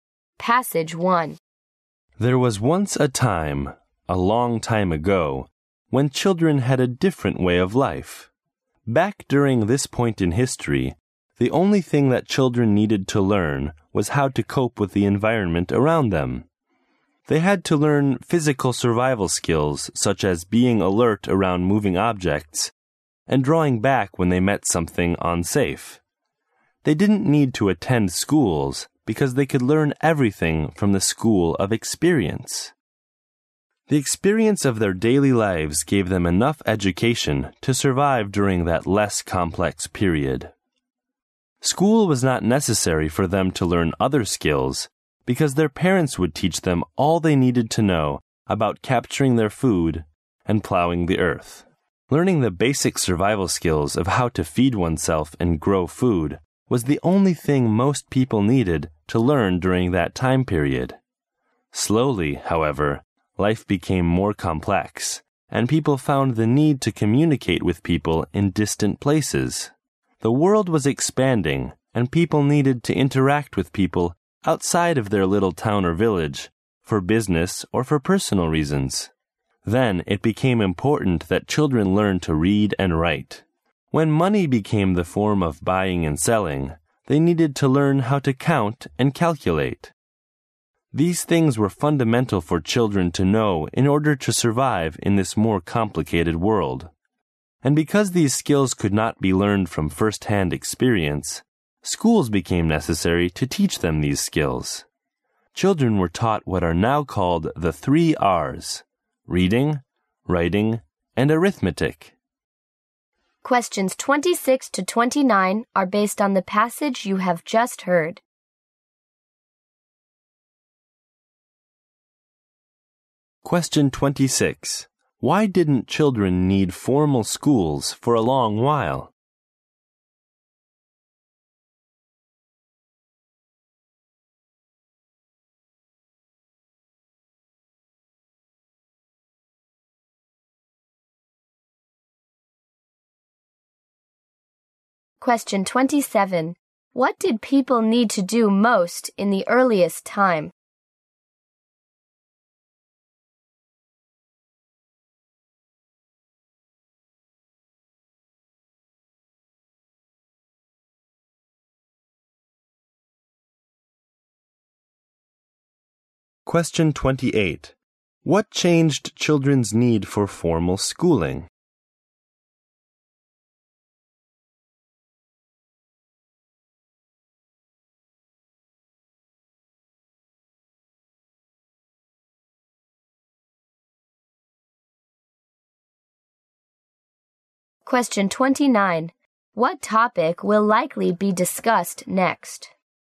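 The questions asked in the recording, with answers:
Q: Why didn't children need formal schools for a long while?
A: They could learn everything they needed from experience and their parents

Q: What did people need to do most in the earliest time?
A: Learn basic survival skills, such as feeding themselves and growing food

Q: What changed children's need for formal schooling?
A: Life became more complex and they needed to read, write and count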